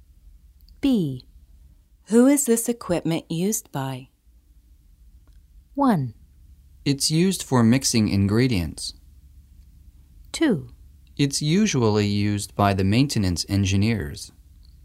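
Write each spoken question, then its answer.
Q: Who is this equipment used by?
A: 2: It's usually used by the maintenance engineers.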